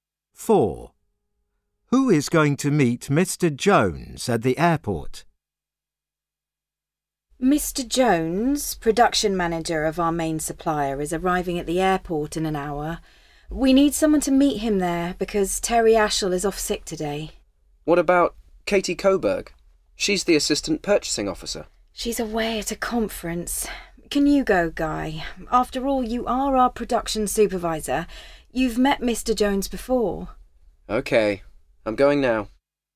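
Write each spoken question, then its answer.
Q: Who is going to meet Mr.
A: Guy, the production supervisor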